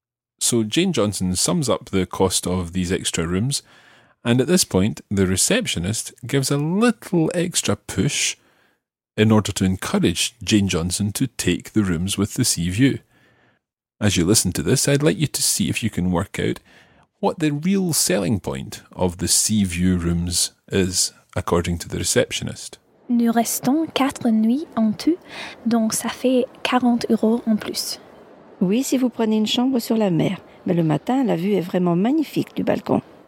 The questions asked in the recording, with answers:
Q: I'd like you to see if you can work out what the real selling point of the sea view rooms is, according to the receptionist.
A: So the view is truly magnificent from the balcony.